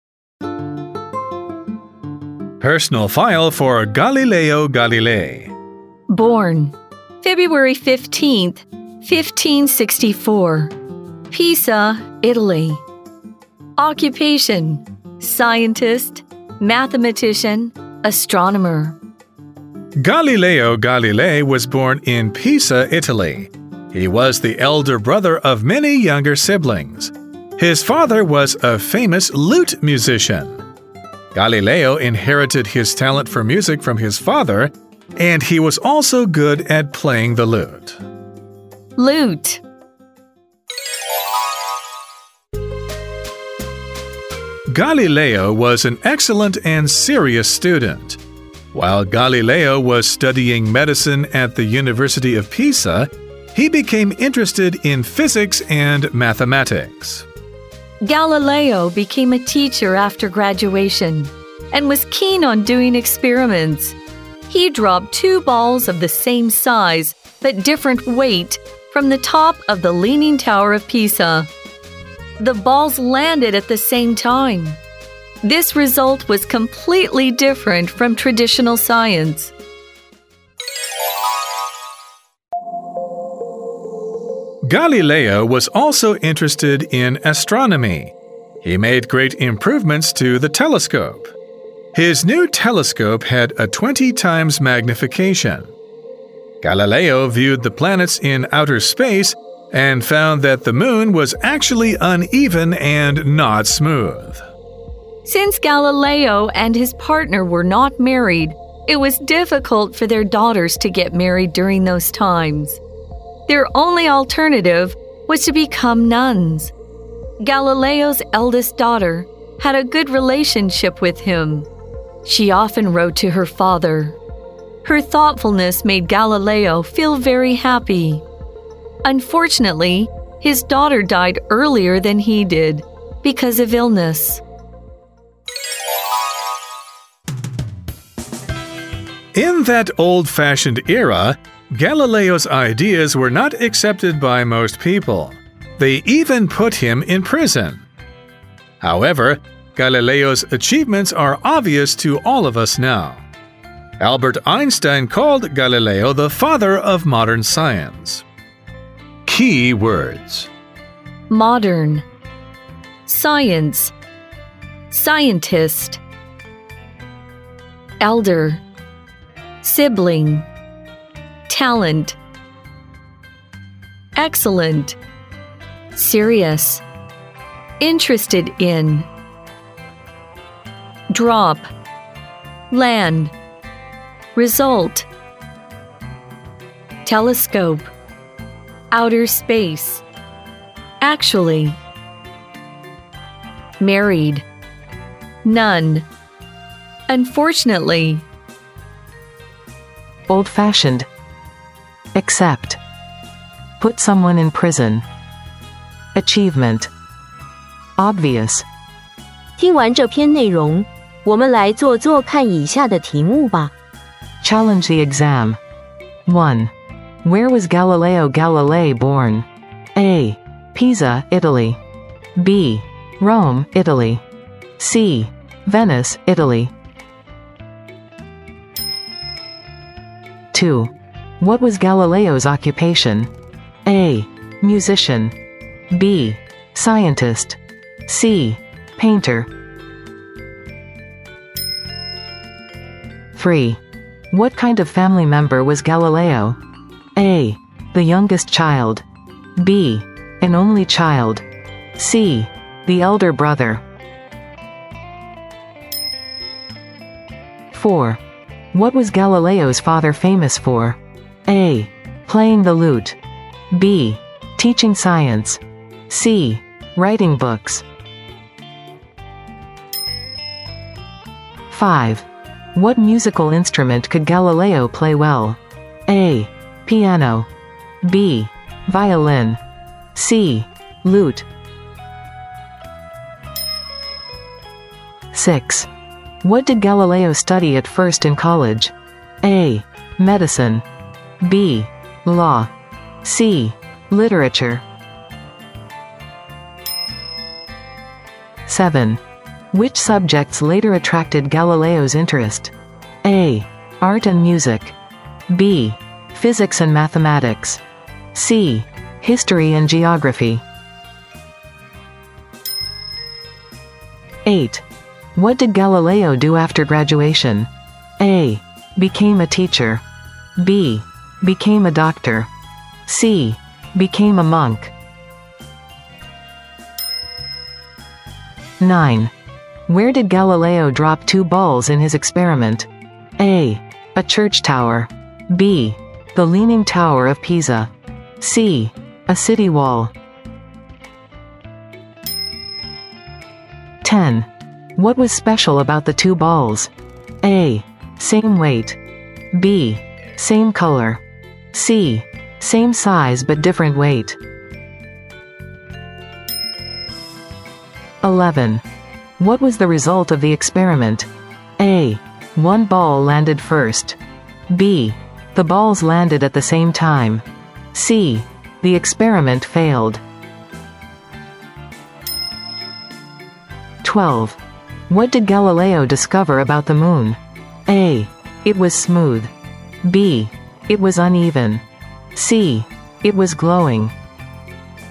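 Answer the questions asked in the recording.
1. A: Pisa, Italy
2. B: Scientist
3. C: The elder brother
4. A: Playing the lute
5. C: lute
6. A: medicine
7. B: physics and mathematics
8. A: became a teacher
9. B: the Leaning Tower of Pisa
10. C: same size but different weight
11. B: the balls landed at the same time
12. B: it was uneven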